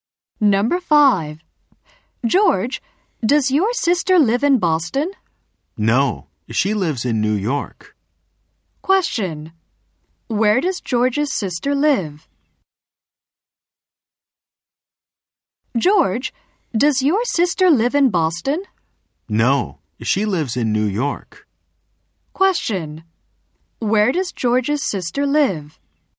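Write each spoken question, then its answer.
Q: Where does George's sister live?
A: In New York.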